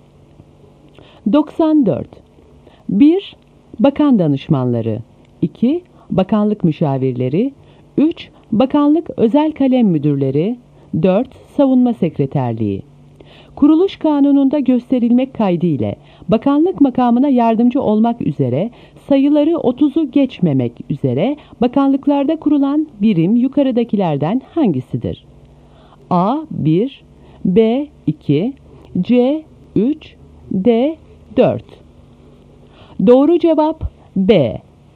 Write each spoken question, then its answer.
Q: Kuruluş kanununda gösterilmek kaydıyla bakanlık makamına yardımcı olmak üzere sayıları 30'u geçmemek üzere bakanlıklarda kurulan birim yukarıdakilerden hangisidir?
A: Doğru cevap B.